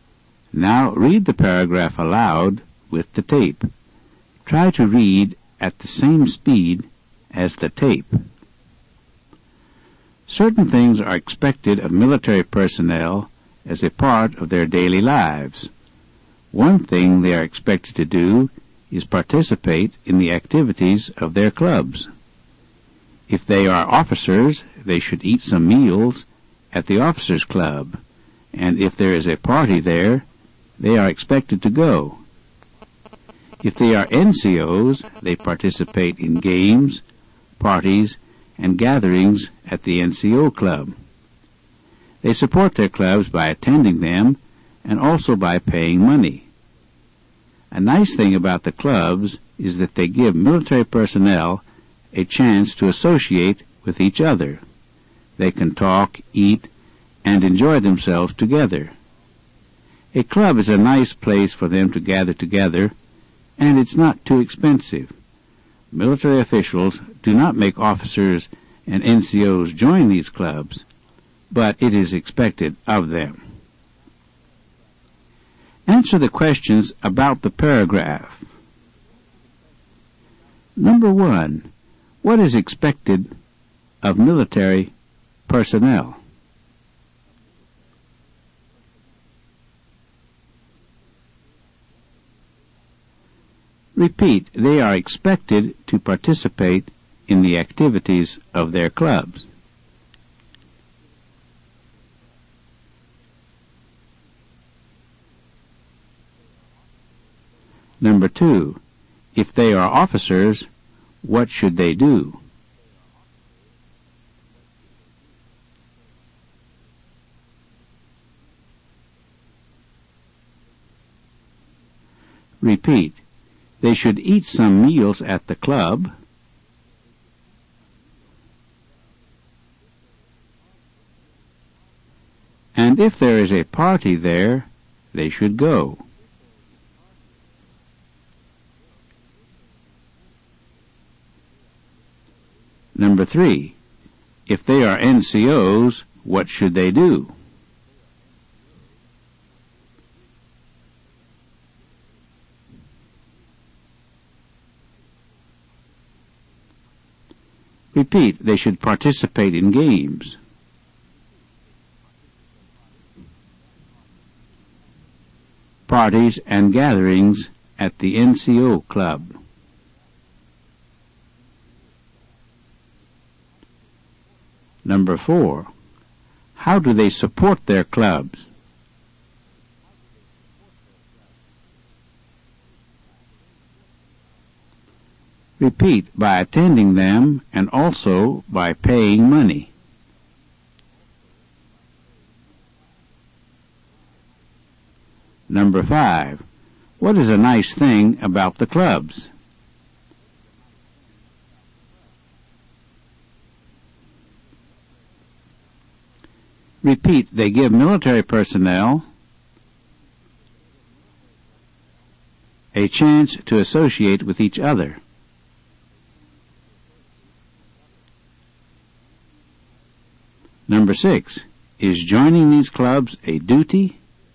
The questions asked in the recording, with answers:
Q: What is expected of military personnel?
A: they are expected to participate in the activities of their clubs.

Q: if they are officers, what should they do?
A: they should eat some meals at the club.

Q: If they are NCOs, what should they do?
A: they should participate in games.

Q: How do they support their clubs?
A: by attending them and also by paying money.

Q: What is a nice thing about the clubs?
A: they give military personnel

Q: is joining these clubs a duty?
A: no, but it's expected.